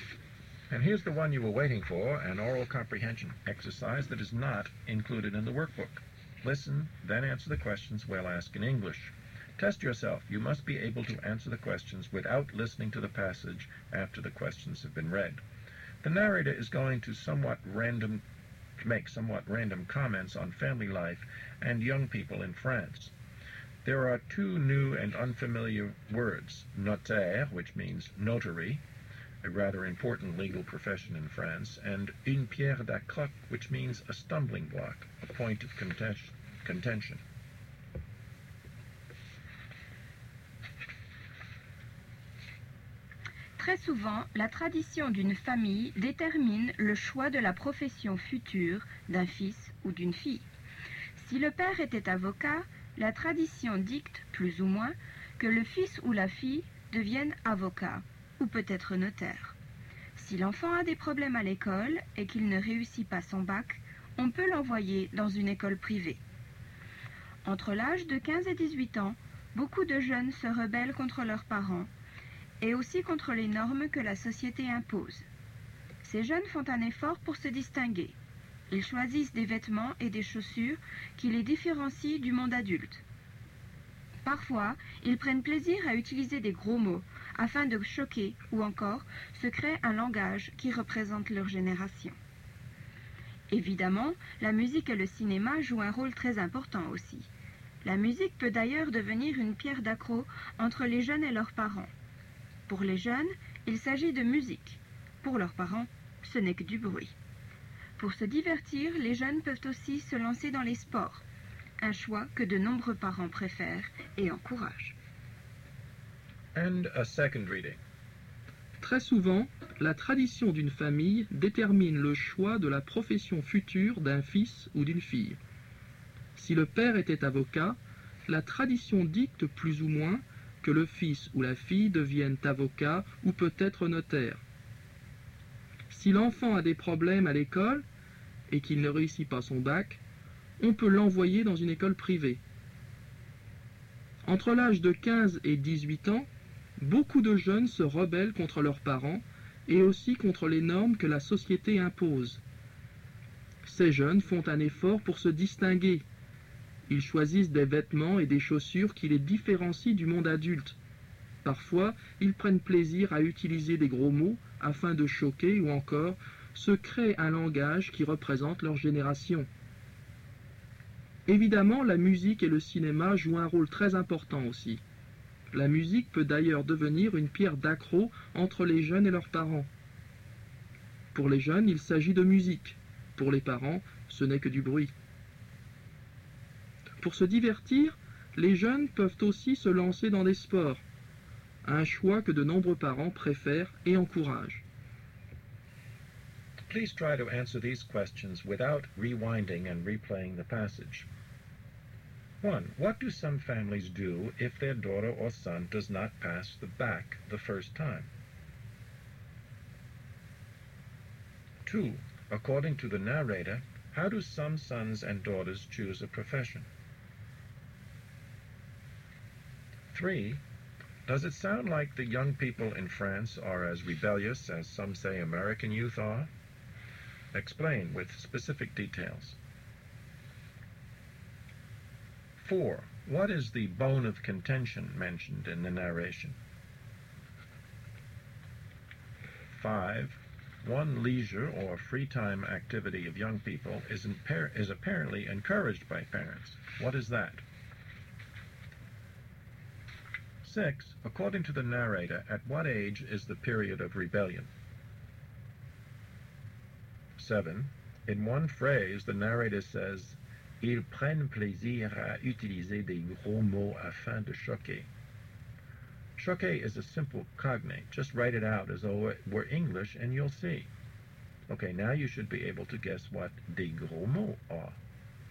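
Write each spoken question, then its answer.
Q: What do some families do if their daughter or son does not pass the BAC the first time?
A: Send them to a private school

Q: According to the narrator, how do some sons and daughters choose a profession?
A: By family tradition, e.g. following the father's profession (lawyer or notary)

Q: What is the bone of contention mentioned in the narration?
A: Music

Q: One leisure or free time activity of young people is apparently encouraged by parents. What is that?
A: Sports

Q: According to the narrator, at what age is the period of rebellion?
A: Between 15 and 18

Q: Okay, now you should be able to guess what des gros mots are.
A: Swear words, bad language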